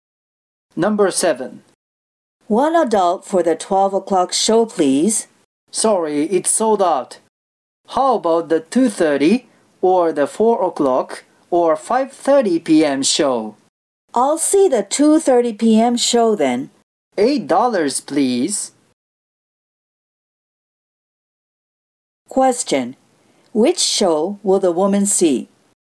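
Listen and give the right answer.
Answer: The 2:30 p.m. show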